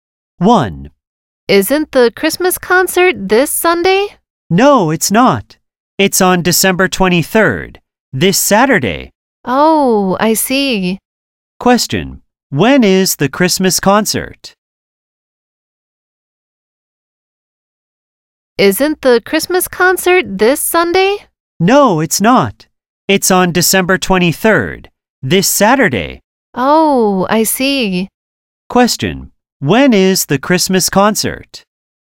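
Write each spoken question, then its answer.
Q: When is the Christmas concert?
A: On December 23rd, this Saturday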